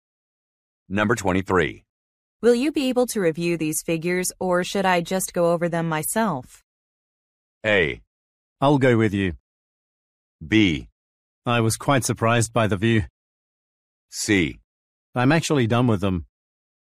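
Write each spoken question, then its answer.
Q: Will you be able to review these figures, or should I just go over them myself?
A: C: I'm actually done with them.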